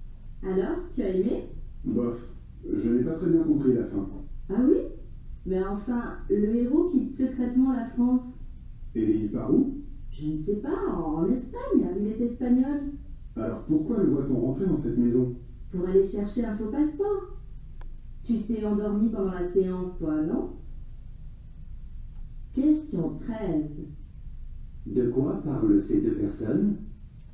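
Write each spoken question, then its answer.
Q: De quoi parlent ces deux personnes?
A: D'un film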